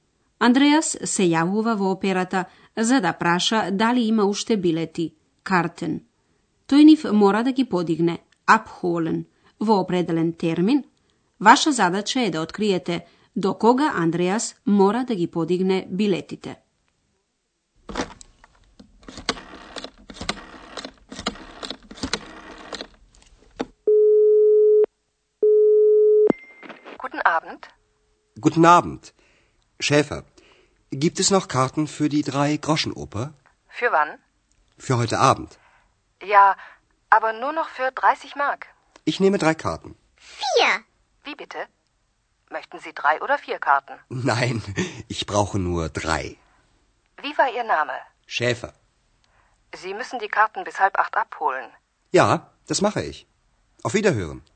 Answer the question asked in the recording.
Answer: Andreas znači biletite ke mora da gi podigne do sedam i pol.